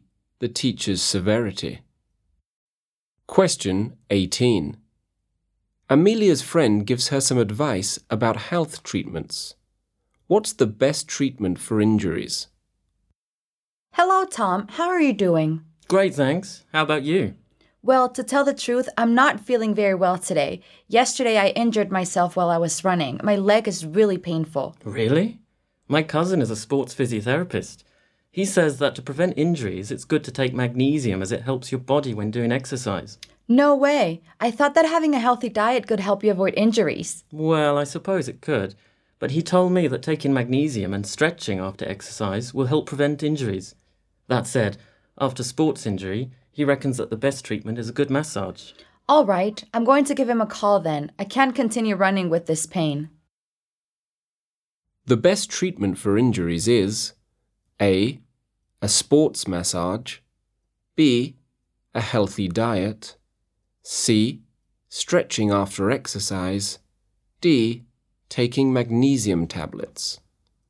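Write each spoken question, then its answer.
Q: What's the best treatment for injuries?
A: A: a sports massage.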